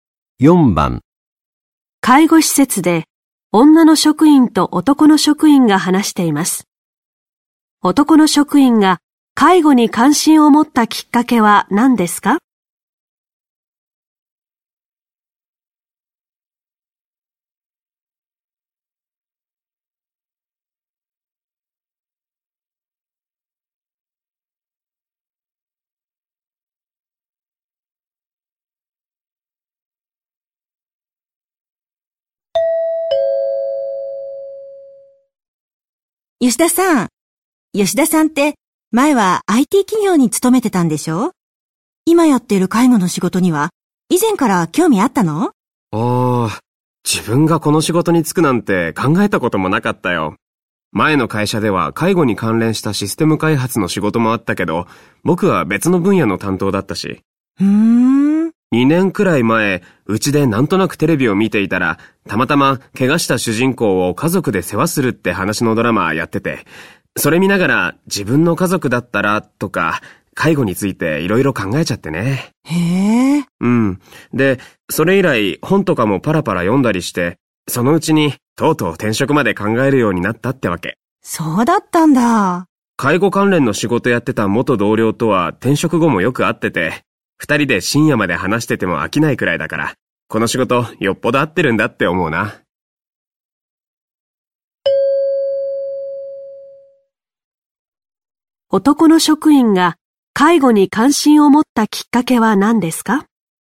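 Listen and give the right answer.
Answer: 家族の介護を描いたテレビドラマを見たこと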